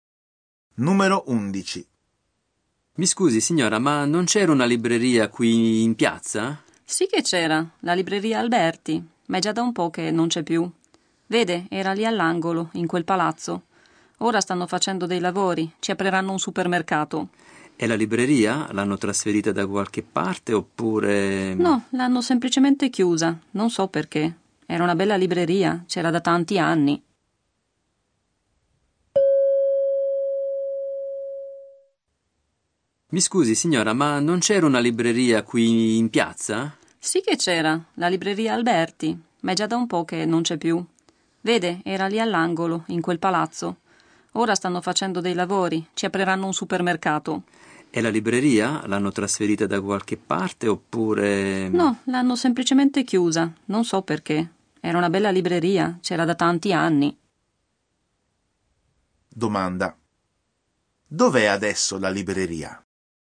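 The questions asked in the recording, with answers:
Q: dov'è adesso la libreria?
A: Non c'è più, l'hanno chiusa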